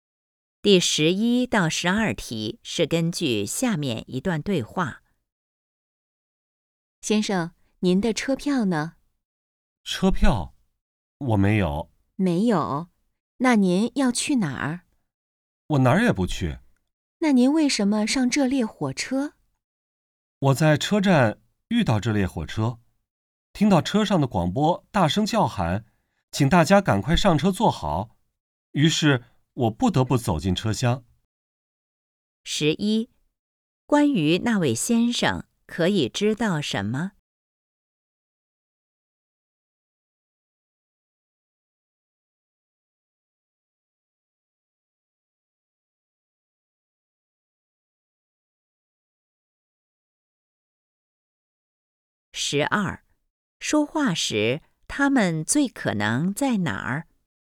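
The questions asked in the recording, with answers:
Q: 说话时他们最可能在哪儿?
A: 火车上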